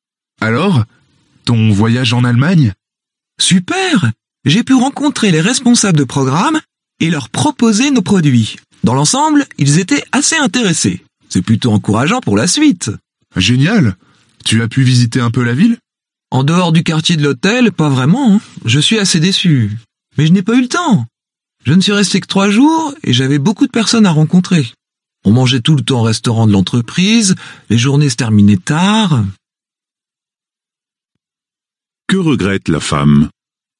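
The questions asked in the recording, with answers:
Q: Que regrette la femme?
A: De ne pas avoir eu le temps de visiter la ville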